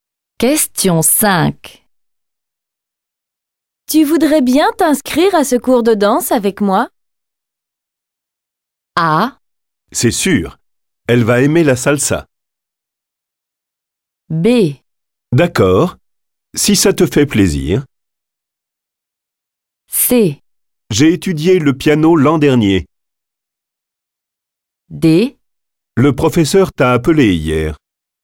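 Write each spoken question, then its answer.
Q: Tu voudrais bien t'inscrire à ce cours de danse avec moi?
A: B: D'accord, si ça te fait plaisir.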